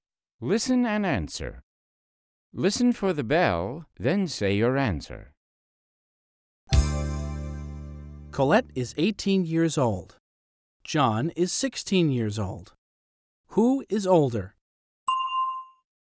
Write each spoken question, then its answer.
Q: Who is older?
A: Colette is. Colette is older than John.